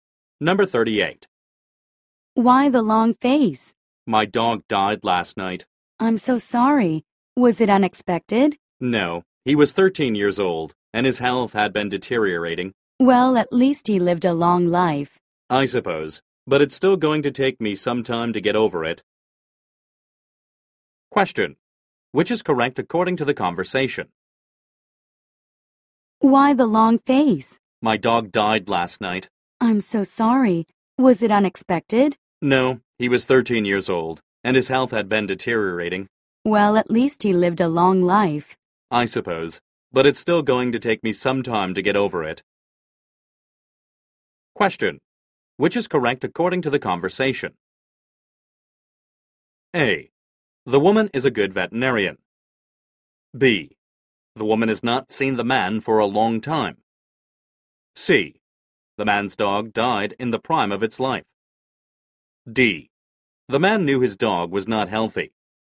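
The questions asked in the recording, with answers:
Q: Which is correct according to the conversation?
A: D: The man knew his dog was not healthy.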